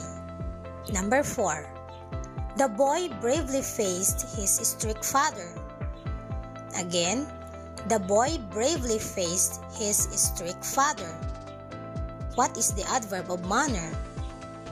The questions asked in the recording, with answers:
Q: What is the adverb of manner?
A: Yes, bravely.